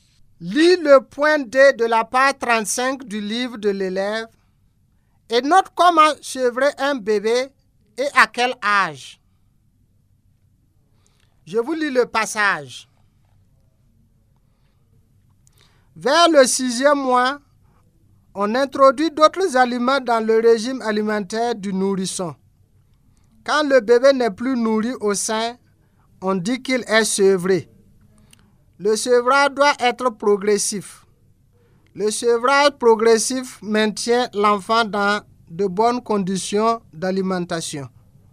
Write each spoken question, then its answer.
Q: Lis le point D de la page 35 du livre de l'élève et note comment sevrer un bébé et à quel âge.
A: à partir de 6 mois, bébé doit être nourri en plus du lait, d'autres aliments comme la bouillie, le bouillon, la purée de fruits ou de légumes, etc.